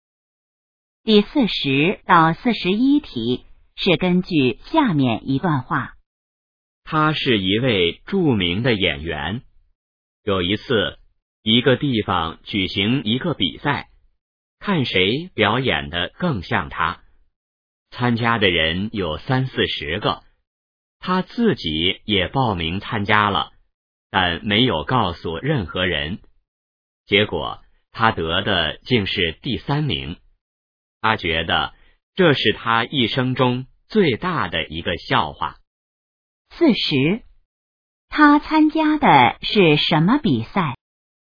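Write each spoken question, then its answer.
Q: 他参加的是什么比赛?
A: 模仿他自己的表演比赛(看谁表演得更像他)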